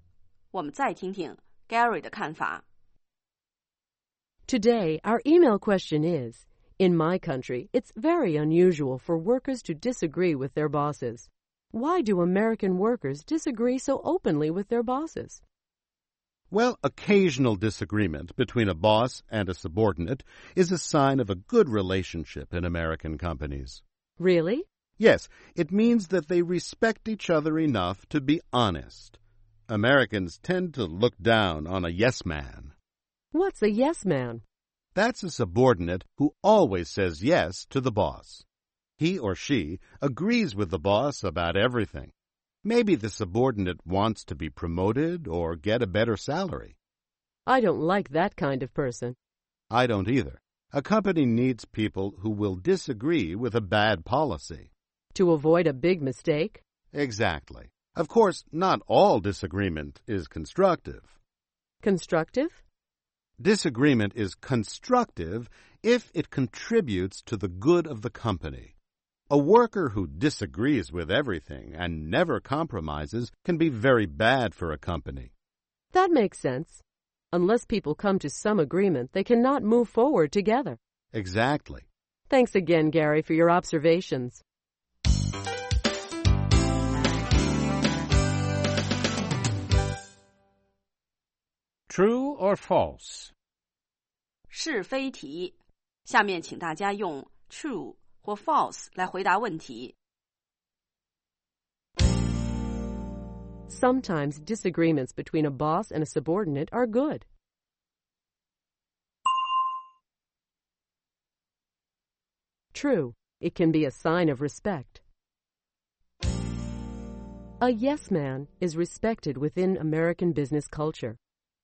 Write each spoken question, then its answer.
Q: A yes man is respected within American business culture.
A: False.Americans tend to look down on someone who always agrees with his or her boss.